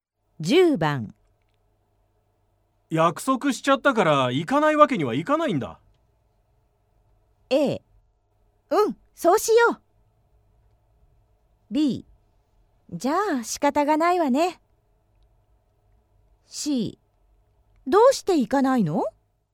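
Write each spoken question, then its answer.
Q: 約束しちゃったから行かないわけにはいかないんだ。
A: B: じゃあ仕方がないわね。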